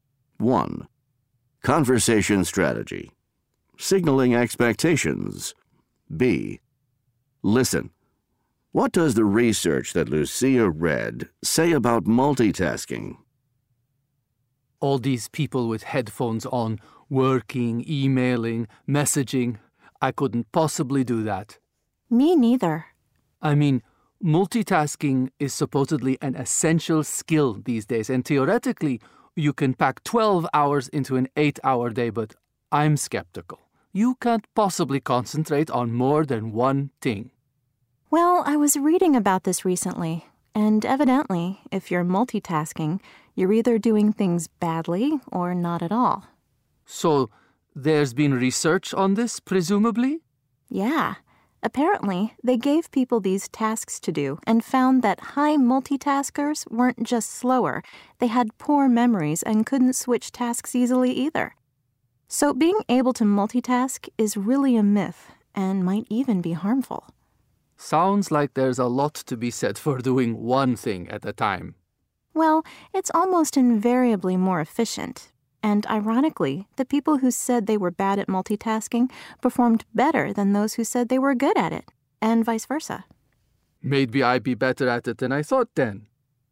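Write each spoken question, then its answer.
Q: What does the research that Lucia read say about multitasking?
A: If you multitask you do things badly or not at all; high multitaskers were slower, had poor memories and couldn't switch tasks easily, so multitasking is a myth and may be harmful.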